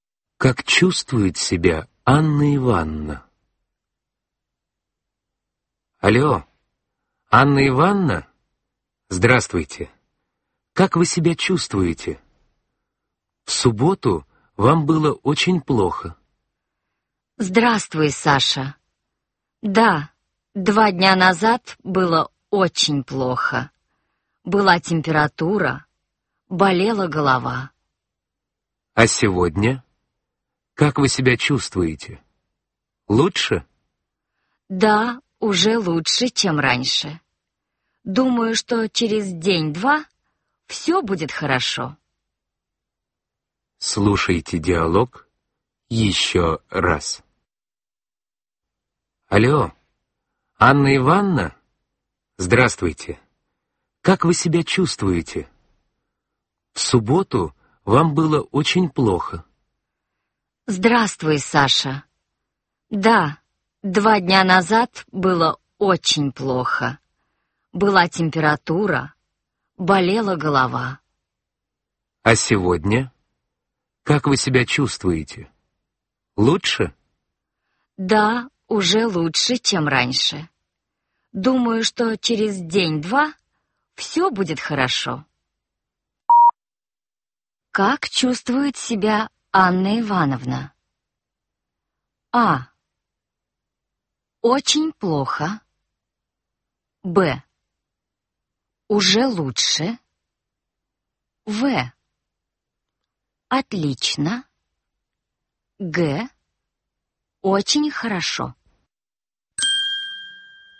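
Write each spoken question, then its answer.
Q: Как чувствует себя Анна Ивановна?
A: Б: Уже лучше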